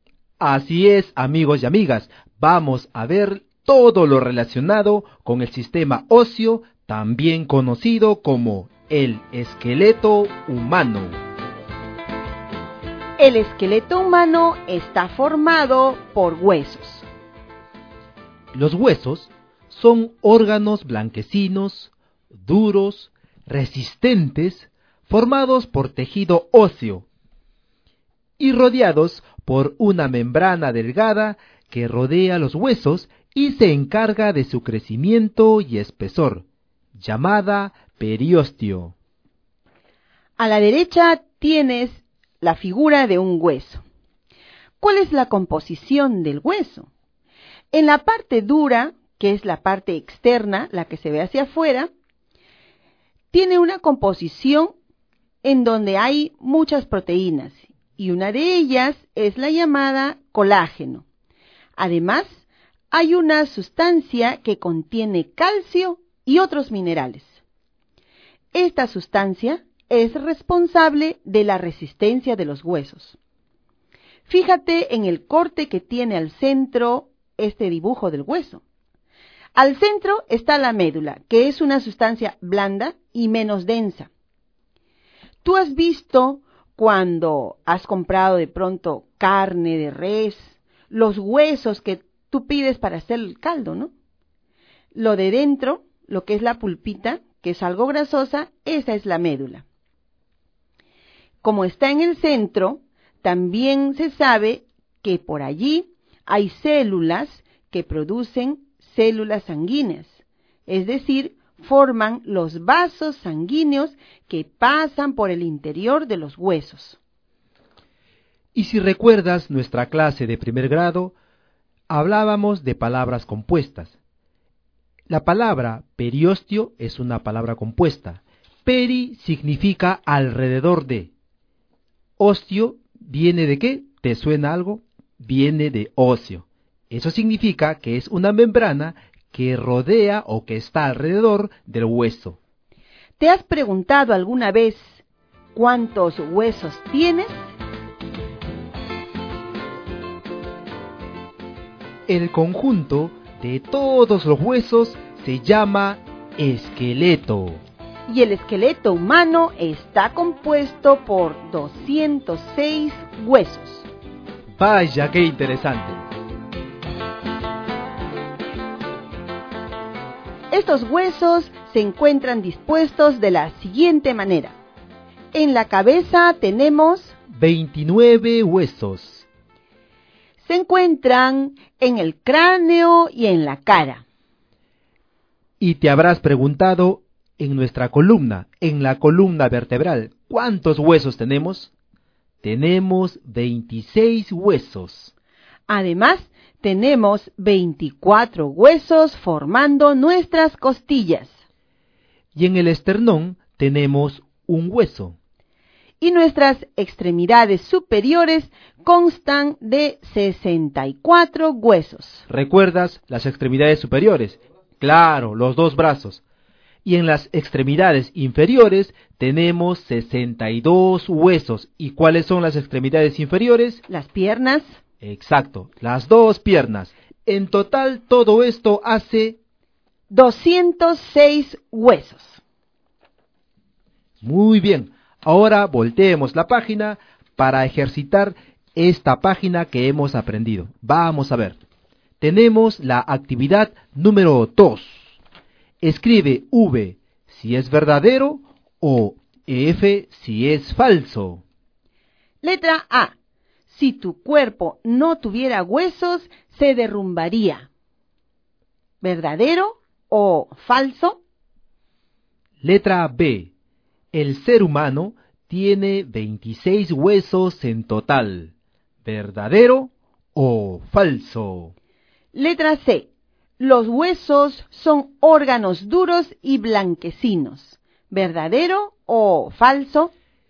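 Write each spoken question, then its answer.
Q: El ser humano tiene 26 huesos en total. ¿Verdadero o falso?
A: Falso (tiene 206 huesos)

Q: Los huesos son órganos duros y blanquecinos. ¿Verdadero o falso?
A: Verdadero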